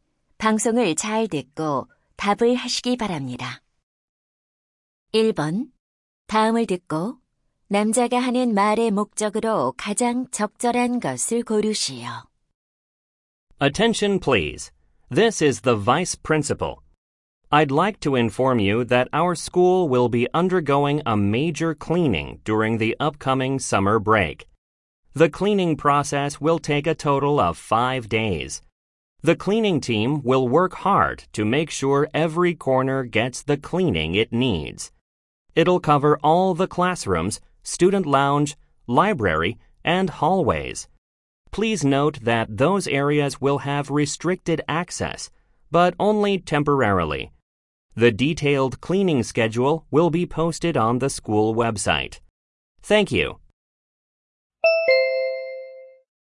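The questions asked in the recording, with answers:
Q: 다음을 듣고 남자가 하는 말의 목적으로 가장 적절한 것을 고르시오.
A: 여름 방학 동안의 학교 대청소 일정을 안내하려고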